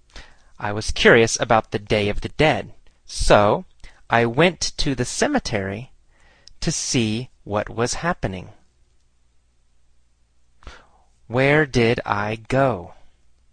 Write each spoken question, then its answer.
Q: Where did I go?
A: To the cemetery. I went to the cemetery.